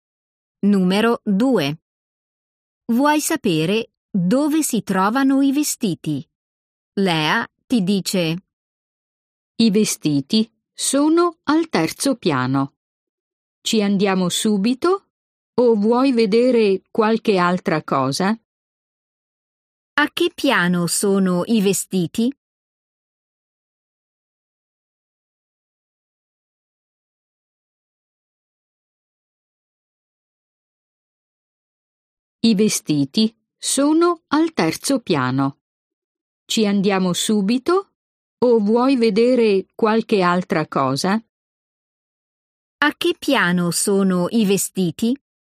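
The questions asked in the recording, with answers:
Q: A che piano sono i vestiti?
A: al terzo piano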